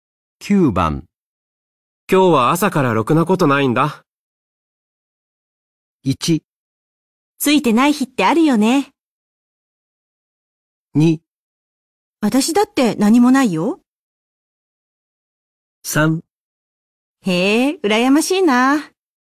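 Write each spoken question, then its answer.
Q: 今日は朝からろくなことないんだ。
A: 1: ついてない日ってあるよね。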